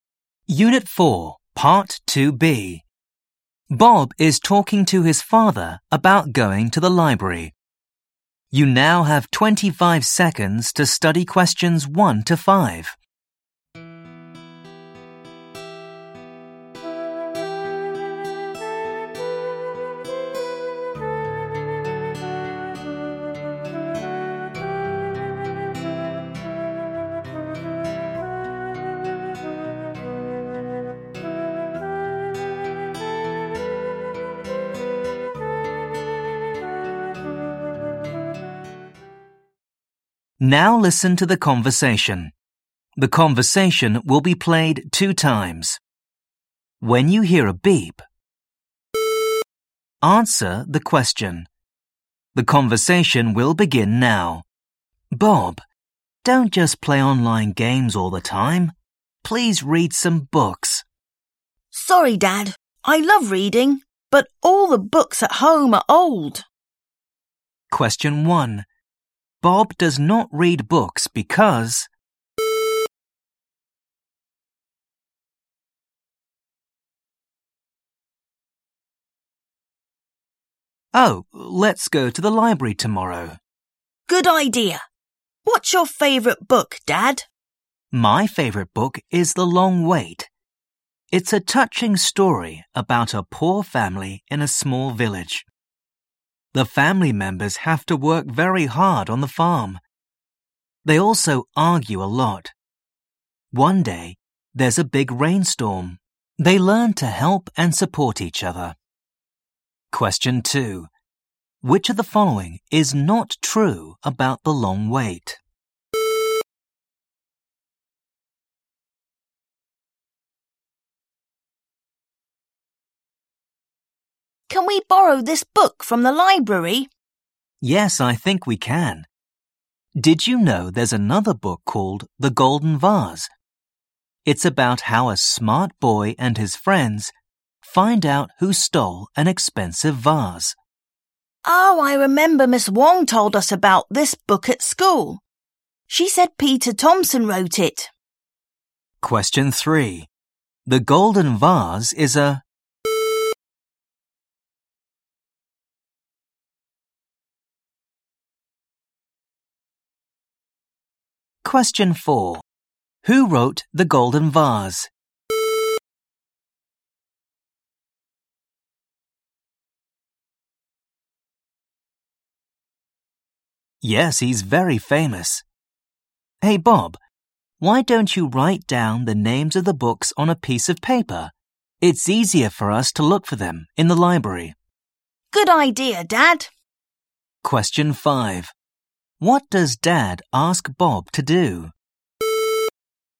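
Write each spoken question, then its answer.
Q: Bob does not read books because...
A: all the books at home are old

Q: Who wrote The Golden Vase?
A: Peter Thompson

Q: What does Dad ask Bob to do?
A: write down the names of the books on a piece of paper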